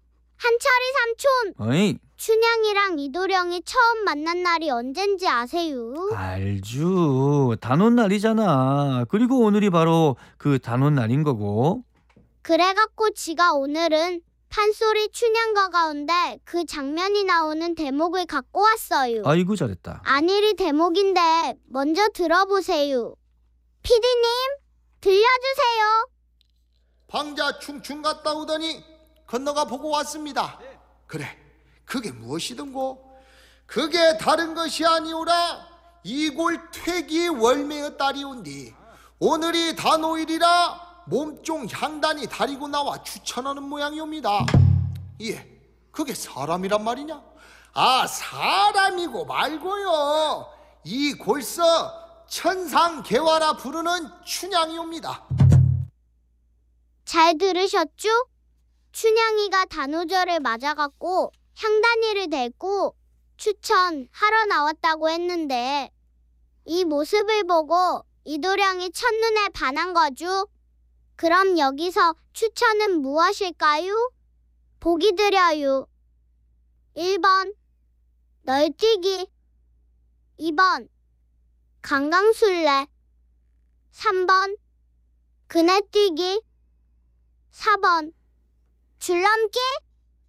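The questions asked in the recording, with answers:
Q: 그럼 여기서 추천은 무엇일까요?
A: 3번: 그네뛰기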